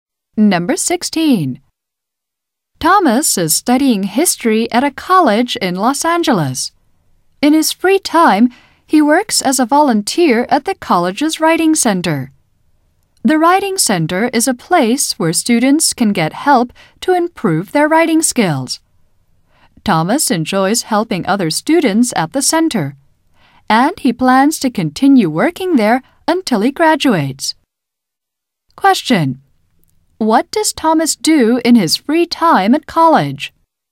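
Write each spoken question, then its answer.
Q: What does Thomas do in his free time at college?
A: He works as a volunteer at the college's writing center.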